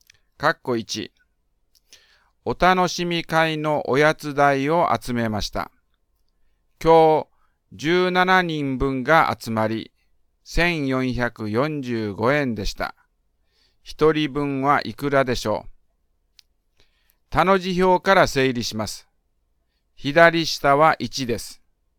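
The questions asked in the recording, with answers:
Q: 一人分はいくらでしょう。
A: 85円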